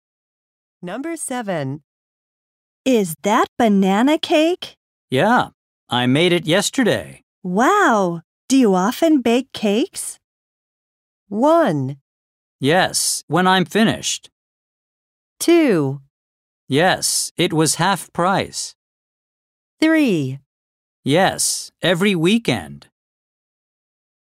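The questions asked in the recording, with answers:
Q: Wow, do you often bake cakes?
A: 3: Yes, every weekend.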